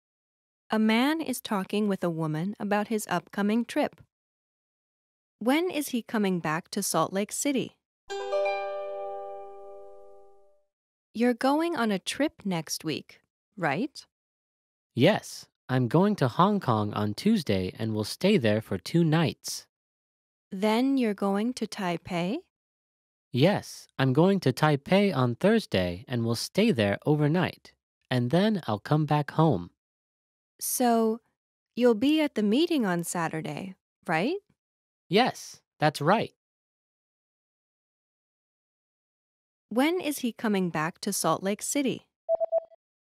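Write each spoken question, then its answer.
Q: When is he coming back to Salt Lake City?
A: Friday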